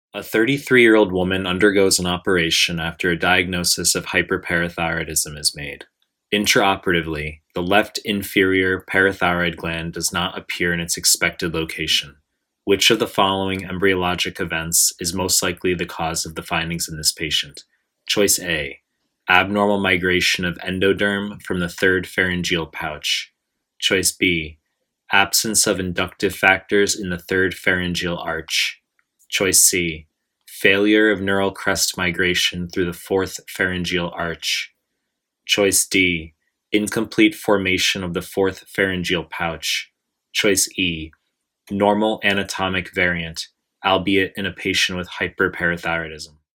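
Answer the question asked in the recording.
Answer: A: abnormal migration of endoderm from the third pharyngeal pouch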